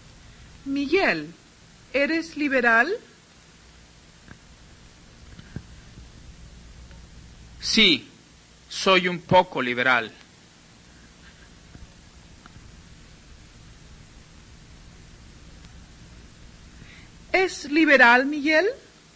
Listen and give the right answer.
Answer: Sí, Miguel es un poco liberal.